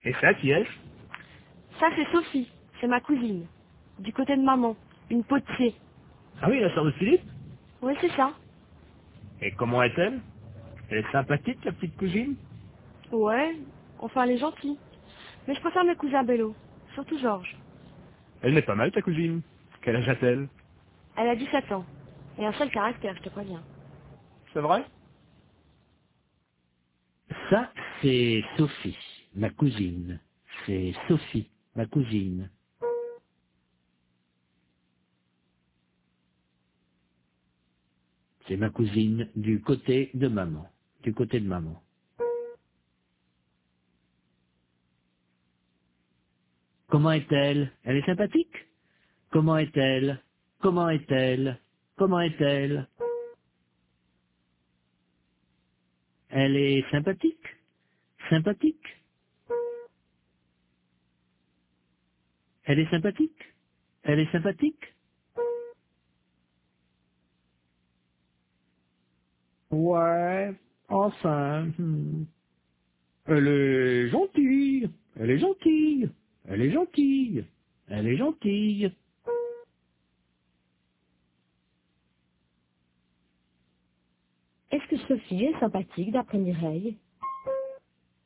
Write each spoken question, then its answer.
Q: Est-ce que Sophie est sympathique d'après Mireille ?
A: Oui, enfin.